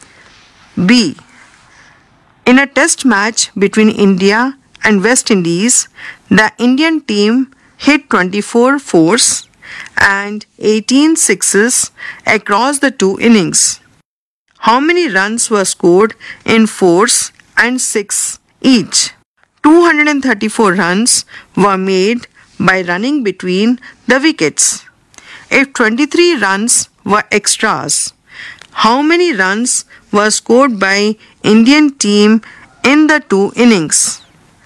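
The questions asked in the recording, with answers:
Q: How many runs were scored in fours and six each?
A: 96 in fours, 108 in sixes

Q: If 23 runs were extras, how many runs were scored by Indian team in the two innings?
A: 461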